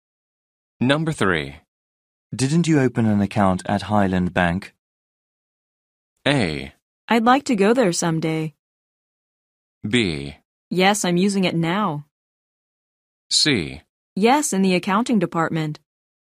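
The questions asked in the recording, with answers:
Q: Didn't you open an account at Highland Bank?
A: B: Yes, I'm using it now.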